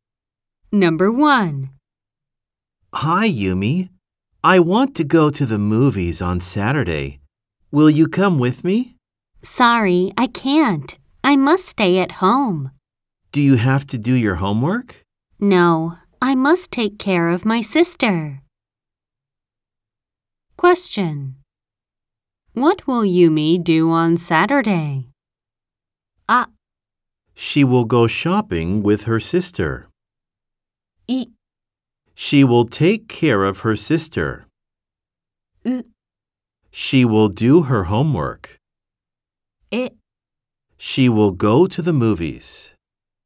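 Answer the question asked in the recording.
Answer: い: She will take care of her sister.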